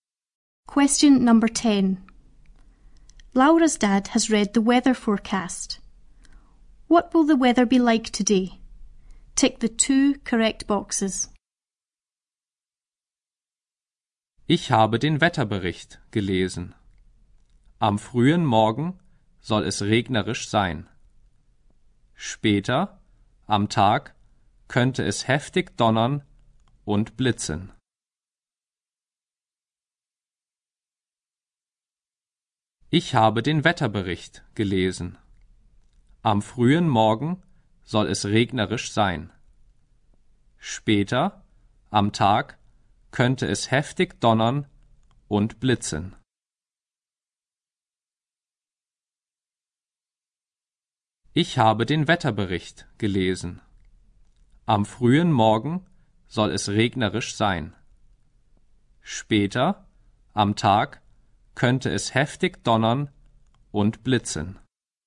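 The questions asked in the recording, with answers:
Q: What will the weather be like today?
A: Rainy early in the morning; thunder and lightning later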